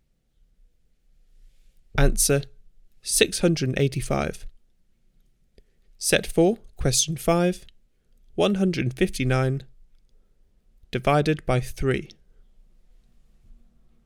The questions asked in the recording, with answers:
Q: 159 divided by 3.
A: Answer 53.